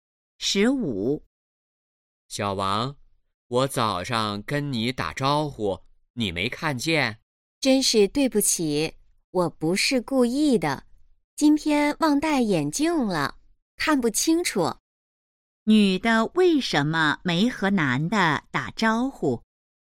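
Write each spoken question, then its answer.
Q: 女的为什么没和男的打招呼?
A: 忘戴眼镜了,看不清楚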